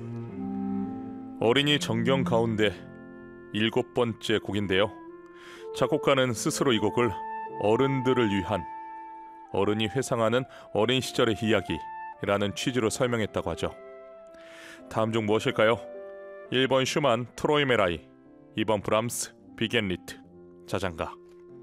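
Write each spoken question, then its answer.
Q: 다음 중 무엇일까요? 1번 슈만 트로이메라이, 2번 브람스 비겐리트 자장가.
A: 1: 슈만 트로이메라이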